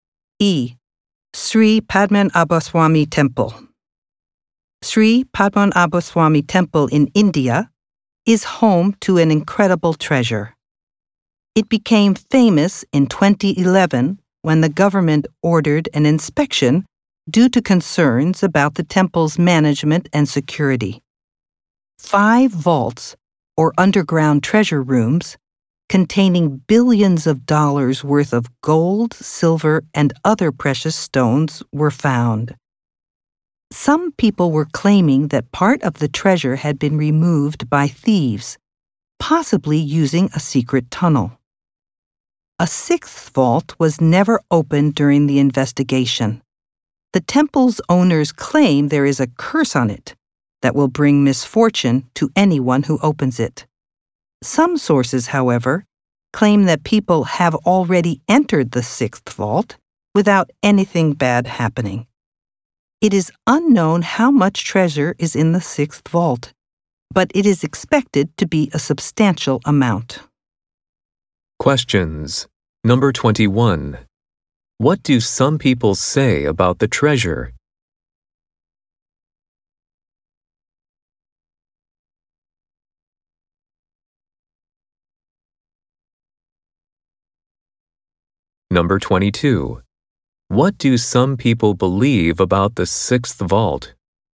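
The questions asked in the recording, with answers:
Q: What do some people say about the treasure?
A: Part of it may have been stolen by thieves, possibly through a secret tunnel.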